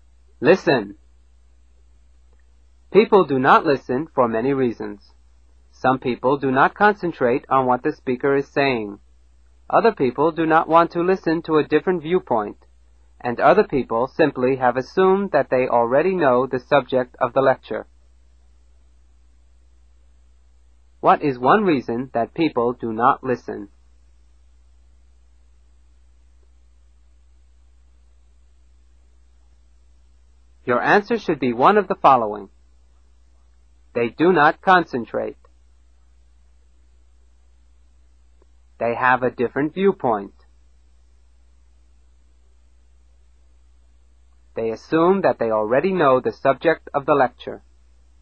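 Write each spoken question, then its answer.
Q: What is one reason that people do not listen?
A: They do not concentrate.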